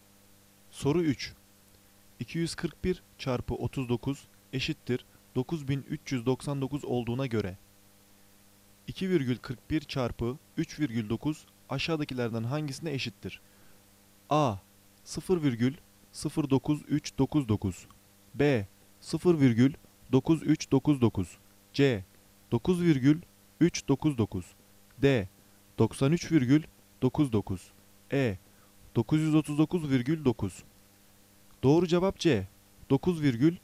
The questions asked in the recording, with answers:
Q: 2,41 çarpı 3,9 aşağıdakilerden hangisine eşittir?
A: Doğru cevap C. 9,399.